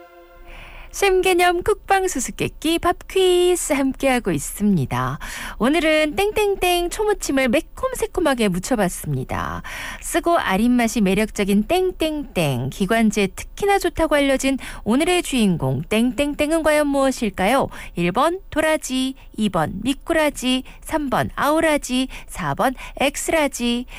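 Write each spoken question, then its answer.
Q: 쓰고 아린맛이 매력적인 땡땡땡, 기관지에 특히나 좋다고 알려진 오늘의 주인공 땡땡땡은 과연 무엇일까요?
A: 1: 도라지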